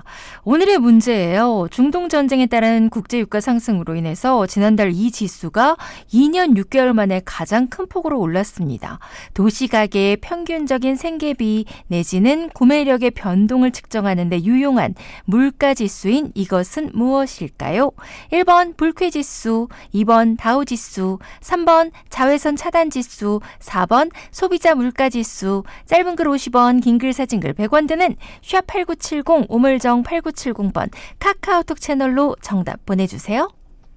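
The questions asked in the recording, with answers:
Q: 도시가계의 평균적인 생계비 내지는 구매력의 변동을 측정하는 데 유용한 물가지수인 이것은 무엇일까요?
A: 4: 소비자 물가지수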